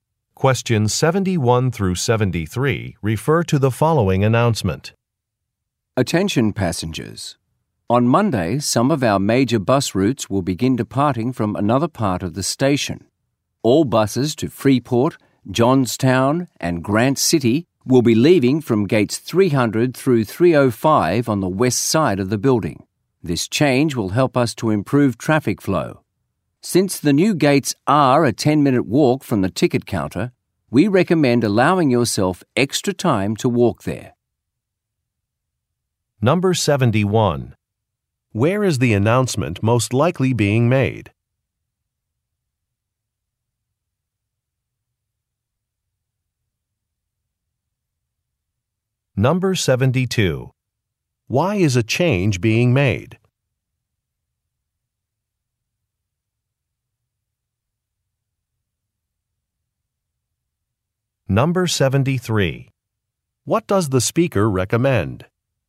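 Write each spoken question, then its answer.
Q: Where is the announcement most likely being made?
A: At a bus station

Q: Why is a change being made?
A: To improve traffic flow

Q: What does the speaker recommend?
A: Allowing extra time to walk to the gates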